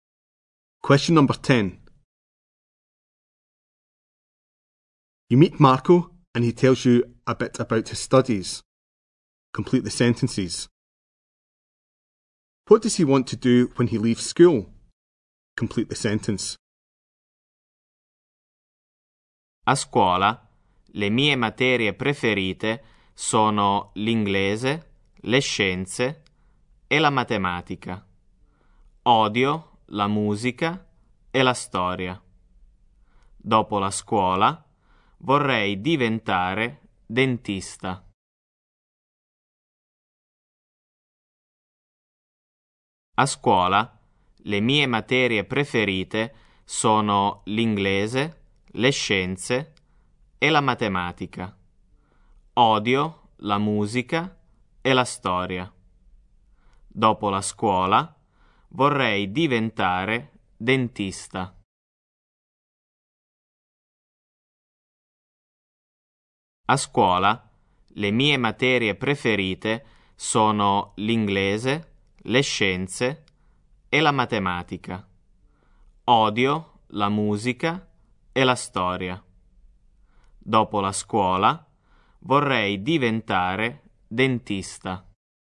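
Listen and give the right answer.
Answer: Become a dentist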